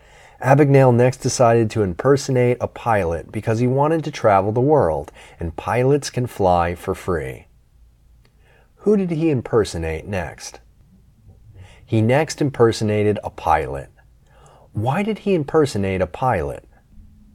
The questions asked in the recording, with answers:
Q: Why did he impersonate a pilot?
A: He impersonated a pilot because he wanted to travel the world and pilots can fly for free.